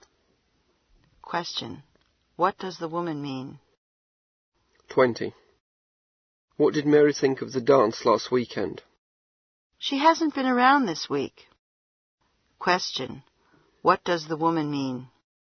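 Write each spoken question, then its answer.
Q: What does the woman mean?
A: She doesn't know because she hasn't seen Mary this week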